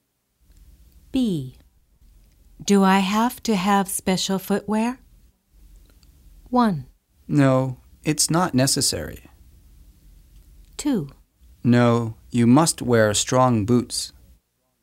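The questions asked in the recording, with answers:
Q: Do I have to have special footwear?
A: 1: No, it's not necessary.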